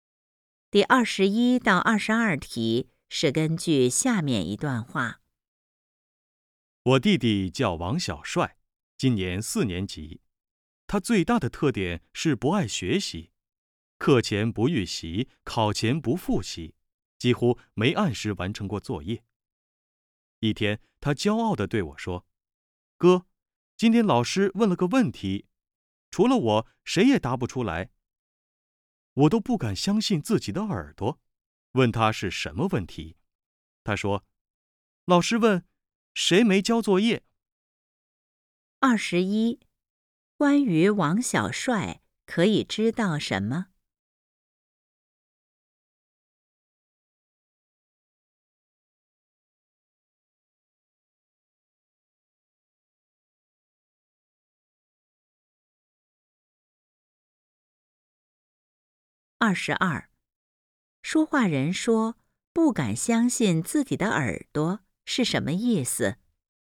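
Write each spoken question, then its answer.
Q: 关于王小帅可以知道什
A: 他不爱学习,没交作业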